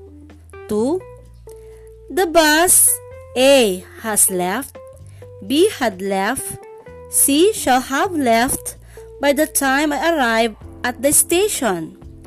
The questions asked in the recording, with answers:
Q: The bus, A, has left, B, had left, C, shall have left by the time I arrive at the station.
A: Correct. The answer is C, shall have left.